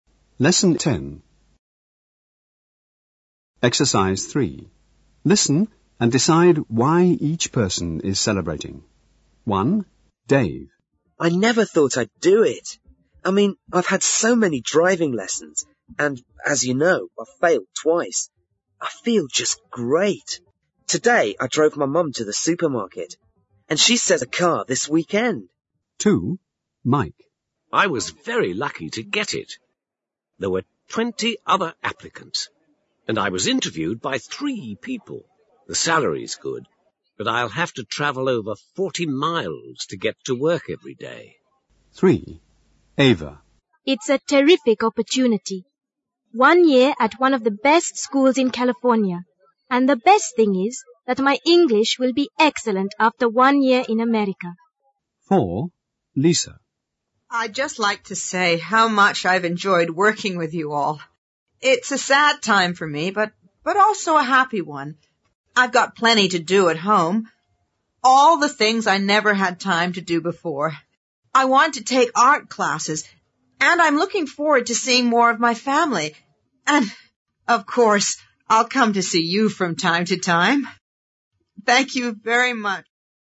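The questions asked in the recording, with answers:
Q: Listen and decide why each person is celebrating.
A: Dave passed his driving test

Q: Listen and decide why each person is celebrating.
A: Mike got a new job

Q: Listen and decide why each person is celebrating.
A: Ava won a place to study for a year at a school in California

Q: Listen and decide why each person is celebrating.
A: Lisa is retiring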